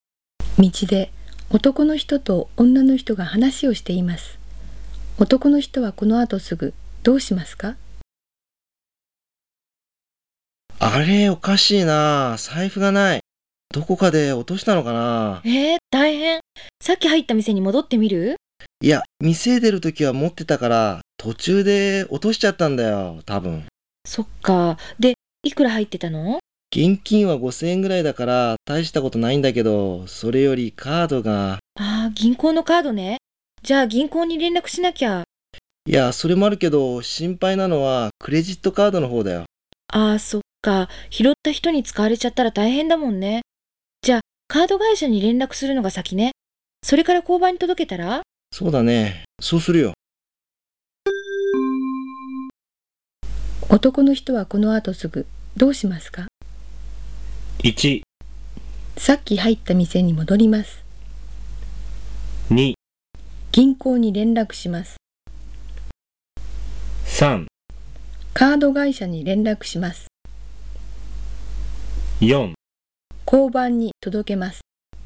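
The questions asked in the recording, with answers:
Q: 男の人はこの後すぐどうしますか?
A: 3: カード会社に連絡します。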